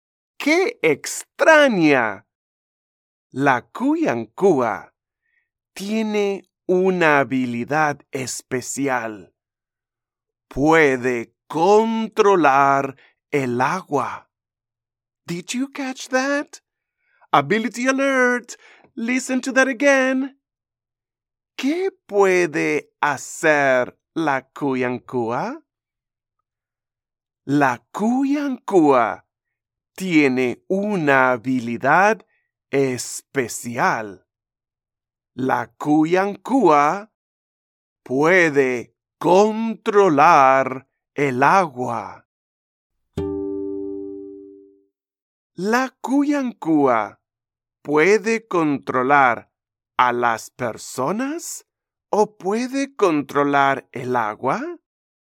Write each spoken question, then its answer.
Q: La Cuyancúa puede controlar a las personas o puede controlar el agua?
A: Sí, puede controlar el agua.